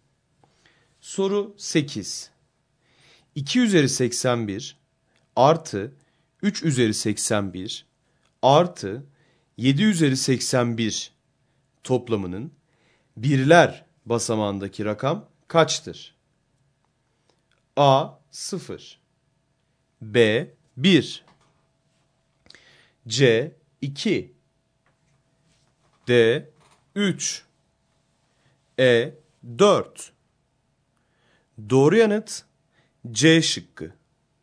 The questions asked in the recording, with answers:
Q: 2 üzeri 81 artı 3 üzeri 81 artı 7 üzeri 81 toplamının birler basamağındaki rakam kaçtır?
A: Doğru yanıt C şıkkı.